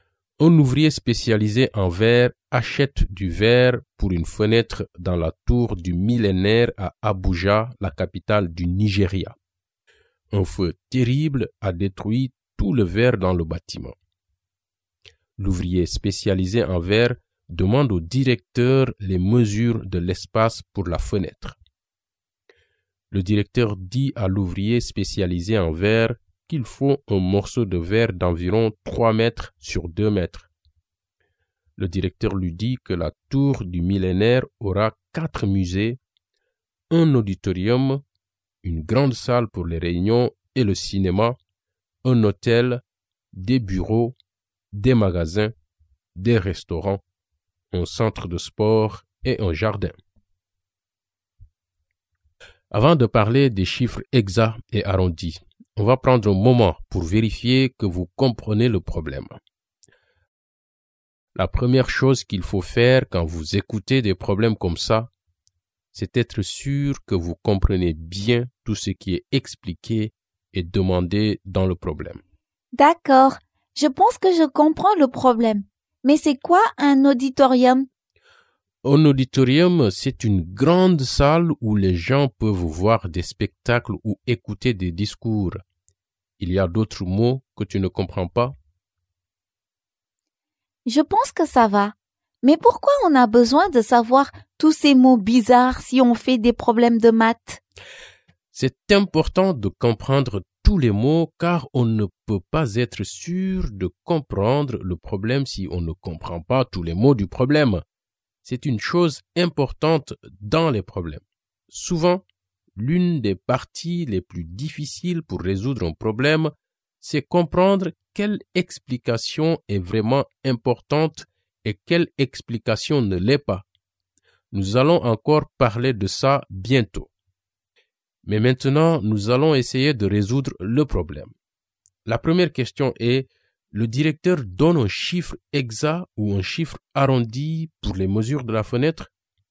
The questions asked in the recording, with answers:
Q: La première question est, le directeur donne un chiffre exact ou un chiffre arrondi pour les mesures de la fenêtre?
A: Je pense que c'est un chiffre arrondi.